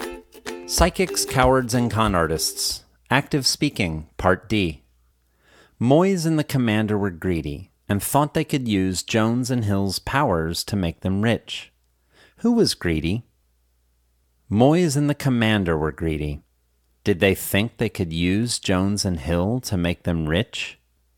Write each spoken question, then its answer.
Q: Who was greedy?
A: Moyes and the Commander were greedy.

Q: Did they think they could use Jones and Hill to make them rich?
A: Yes, they thought they could use Jones and Hill to make them rich.